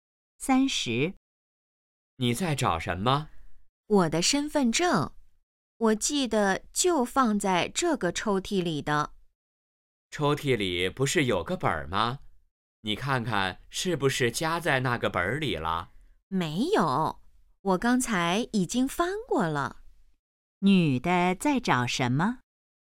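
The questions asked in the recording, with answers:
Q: 女的在找什么?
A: 身份证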